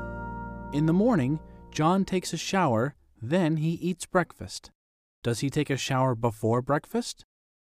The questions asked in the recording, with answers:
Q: Does he take a shower before breakfast?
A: Yes, he does. He takes a shower before breakfast.